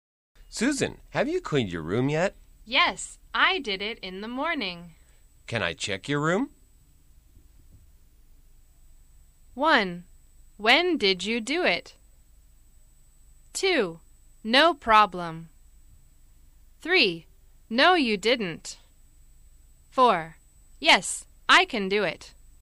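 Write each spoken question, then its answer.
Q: Can I check your room?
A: 2: No problem.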